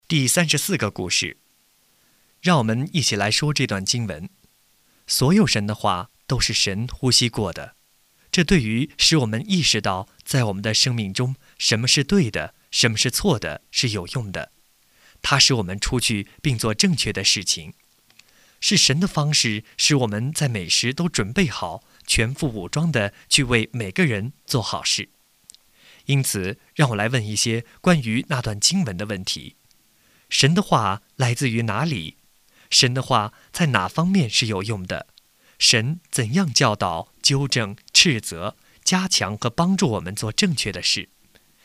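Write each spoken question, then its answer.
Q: 神的话来自于哪里?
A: 神呼吸过的(来自神)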